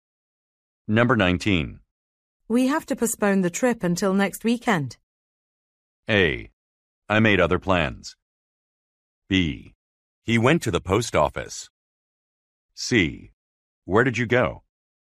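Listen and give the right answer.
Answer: A: I made other plans.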